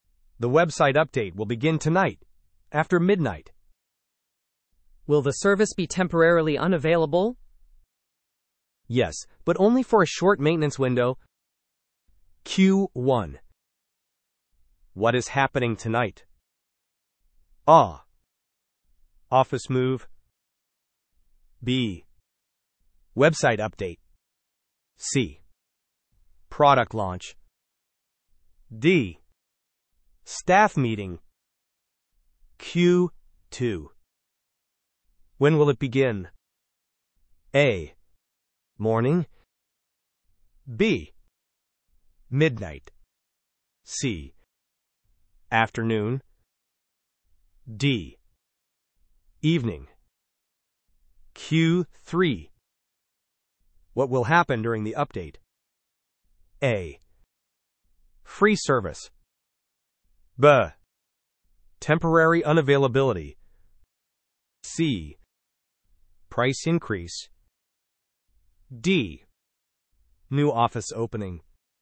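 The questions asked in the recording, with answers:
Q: What is happening tonight?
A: B: Website update.

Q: When will it begin?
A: B: Midnight.

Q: What will happen during the update?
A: B: Temporary unavailability.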